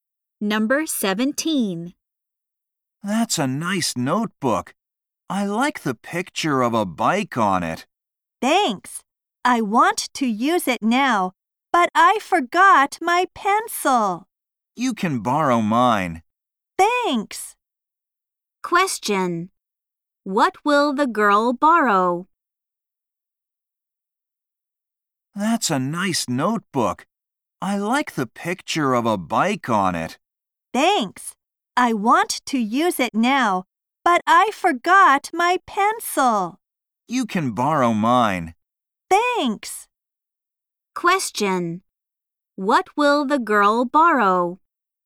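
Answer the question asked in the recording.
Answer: A pencil.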